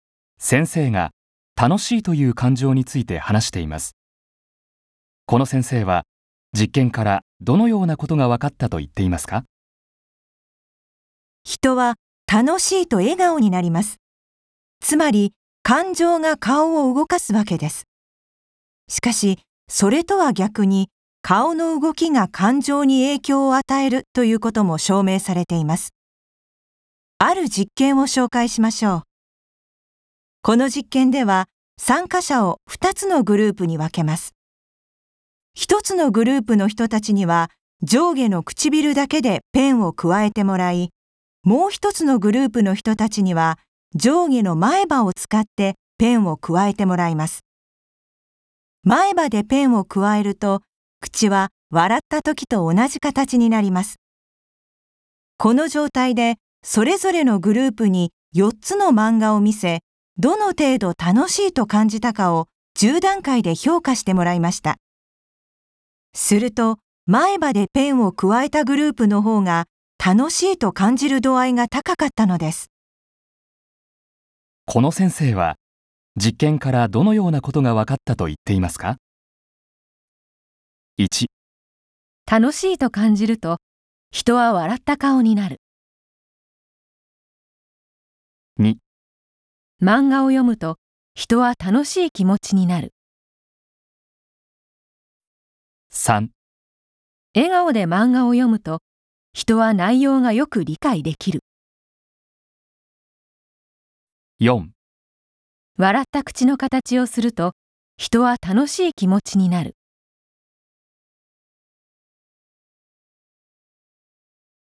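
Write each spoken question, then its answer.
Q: この先生は実験からどのようなことが分かったと言っていますか?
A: 4: 笑った口の形をすると人は楽しい気持ちになる。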